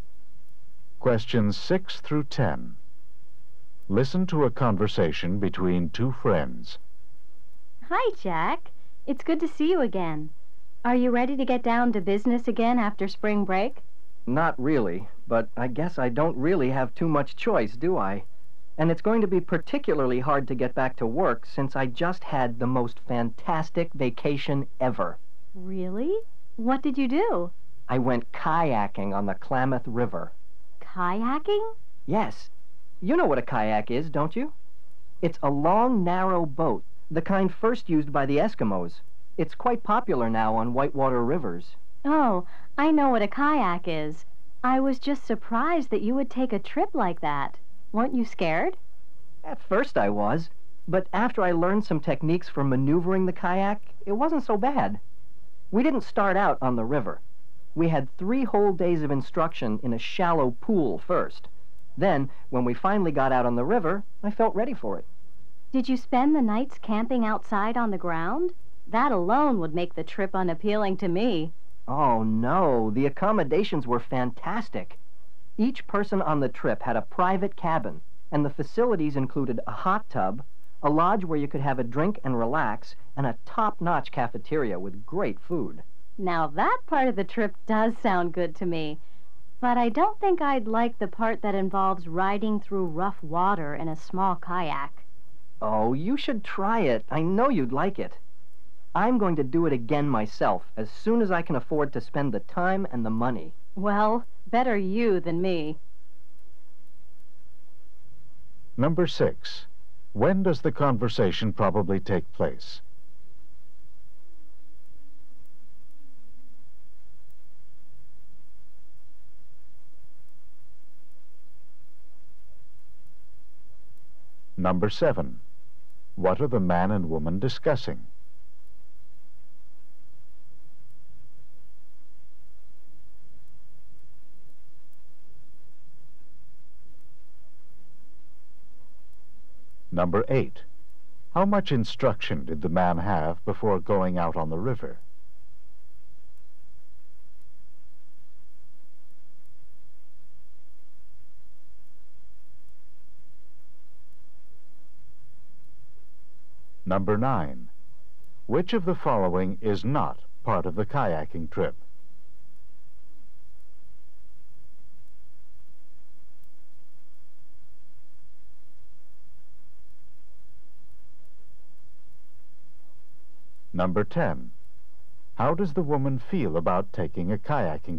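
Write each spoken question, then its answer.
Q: When does the conversation probably take place?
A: Just after spring break.

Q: What are the man and woman discussing?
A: The man's kayaking trip.

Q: How much instruction did the man have before going out on the river?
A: Three days.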